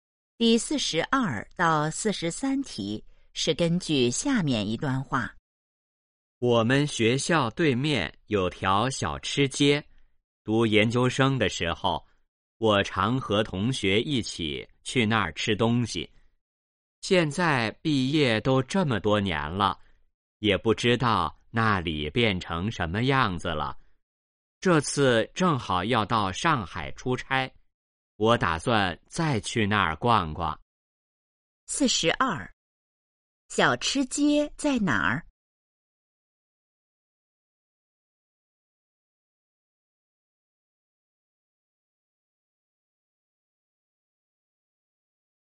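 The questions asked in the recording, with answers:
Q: 小吃街在哪儿?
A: 学校对面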